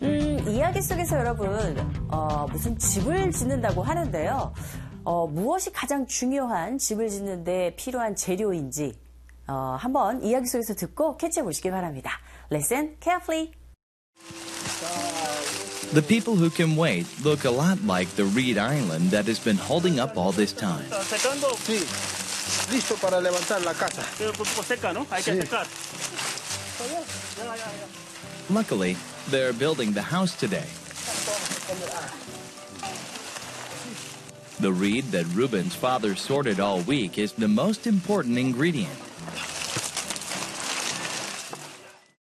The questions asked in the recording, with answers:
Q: 무엇이 가장 중요한 집을 짓는데 필요한 재료인지 한번 이야기 속에서 듣고 캐치해 보시기 바랍니다.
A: 일주일 내내 분류한 갈대, 그것이 바로 주재료인 거죠.